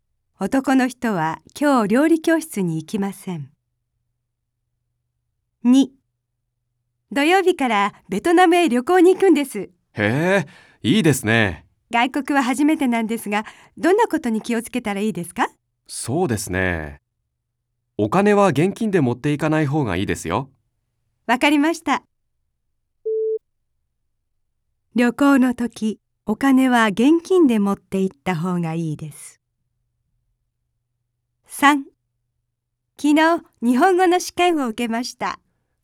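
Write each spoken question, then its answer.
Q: 旅行の時、お金は現金で持って行った方がいいです。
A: ×(正しくない)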